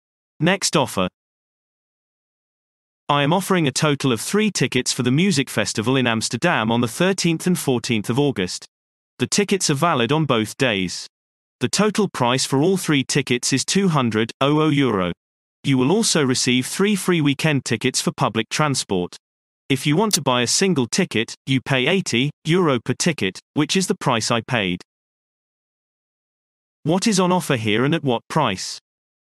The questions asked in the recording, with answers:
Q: What is on offer here and at what price?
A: Response. 3 tickets for the music festival in Amsterdam for €200.